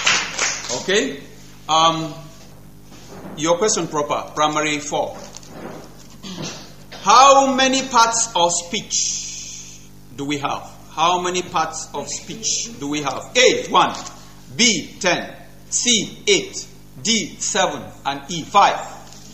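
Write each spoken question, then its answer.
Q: How many parts of speech do we have?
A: C: 8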